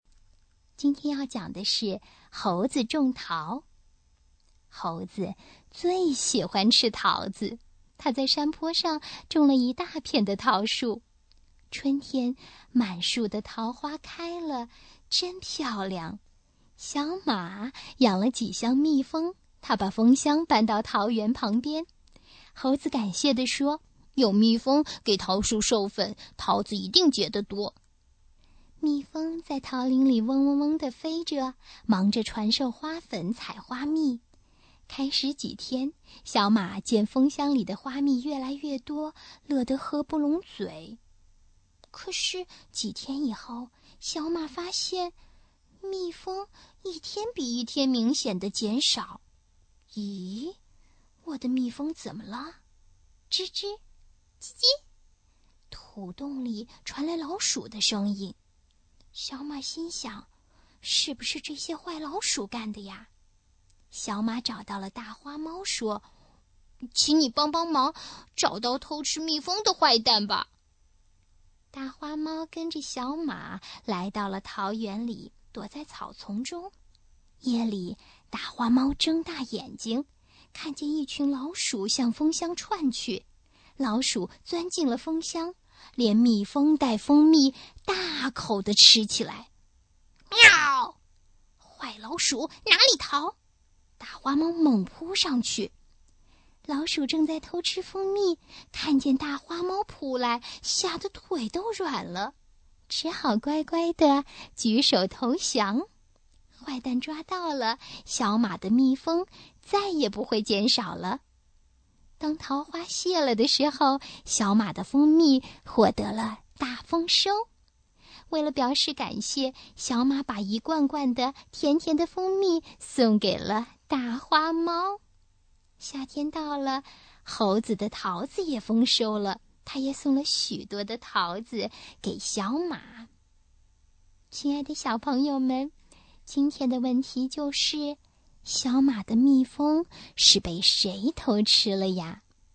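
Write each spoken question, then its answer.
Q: 小马的蜜蜂是被谁偷吃了呀?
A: 老鼠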